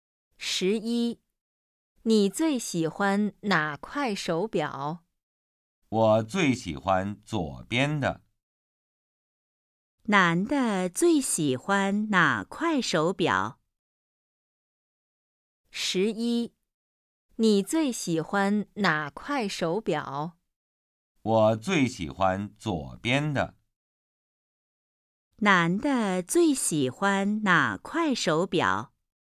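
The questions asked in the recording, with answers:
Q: 男的最喜欢哪块手表?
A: 左边的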